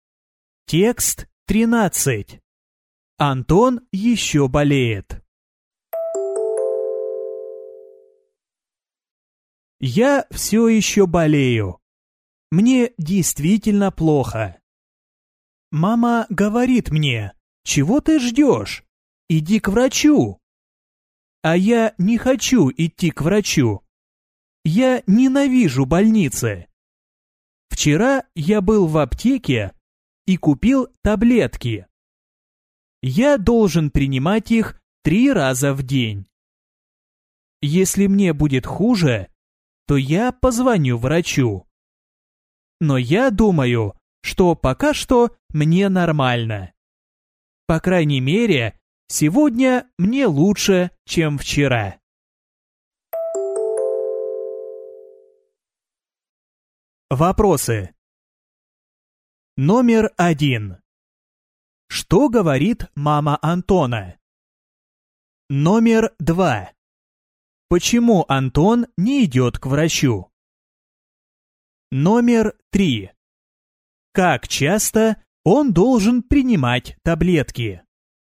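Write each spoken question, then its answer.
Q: Что говорит мама Антона?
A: Чего ты ждешь? Иди к врачу.

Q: Почему Антон не идет к врачу?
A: Он ненавидит больницы.

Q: Как часто он должен принимать таблетки?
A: 3 раза в день.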